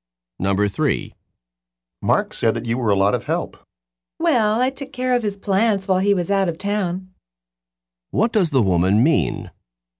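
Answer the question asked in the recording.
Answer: She took care of Mark's plants while he was away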